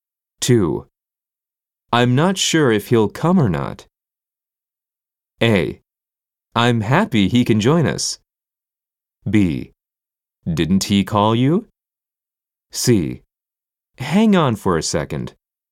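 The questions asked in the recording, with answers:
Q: I'm not sure if he'll come or not.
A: B: Didn't he call you?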